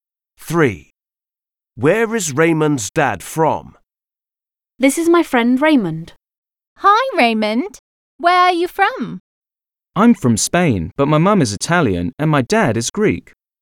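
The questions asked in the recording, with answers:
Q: Where is Raymond's dad from?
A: Greece (he is Greek)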